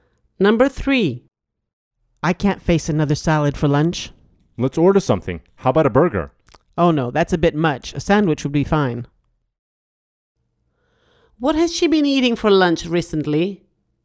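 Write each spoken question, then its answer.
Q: What has she been eating for lunch recently?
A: Salad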